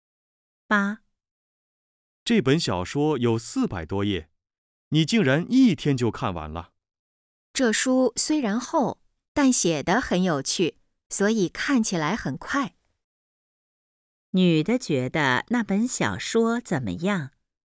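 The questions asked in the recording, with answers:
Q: 女的觉得那本小说怎么样?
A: 很有趣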